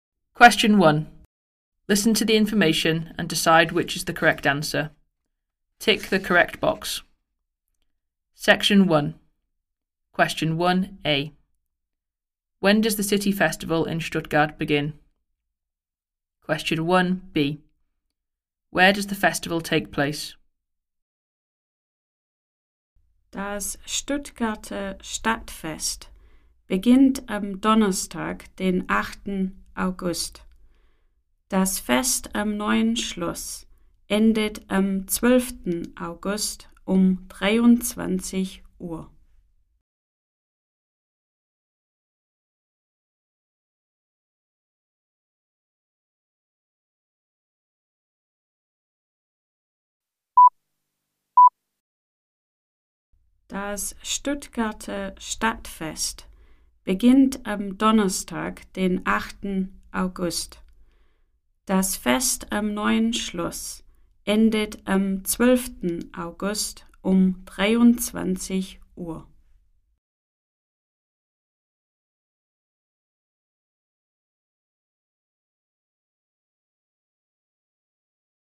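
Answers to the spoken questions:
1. Thursday 8th August
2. At the New Palace (Neues Schloss)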